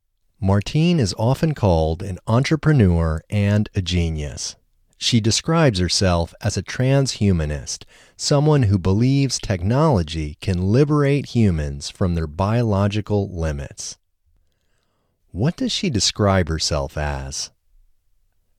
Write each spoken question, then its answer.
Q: What does she describe herself as?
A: She describes herself as a transhumanist.